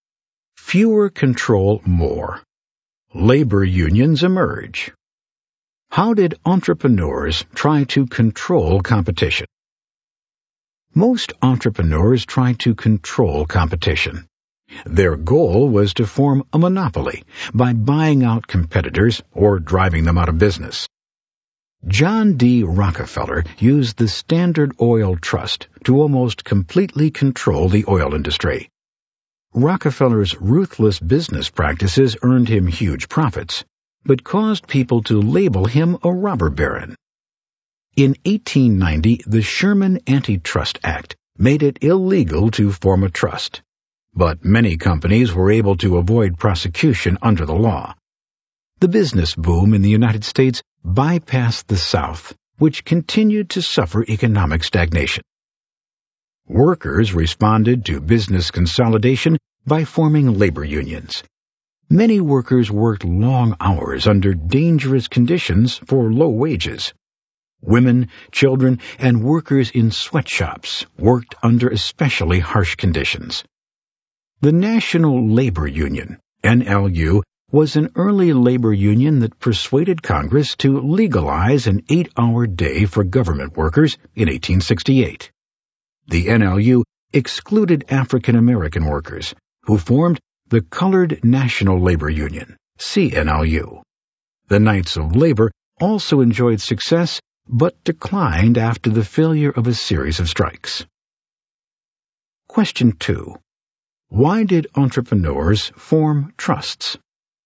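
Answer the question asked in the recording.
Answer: To control competition and form a monopoly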